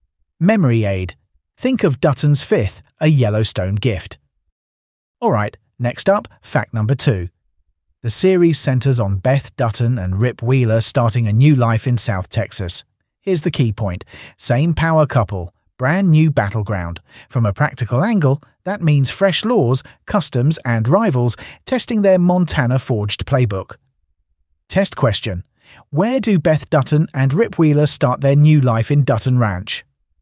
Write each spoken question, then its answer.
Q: Where do Beth Dutton and Rip Wheeler start their new life in Dutton Ranch?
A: South Texas.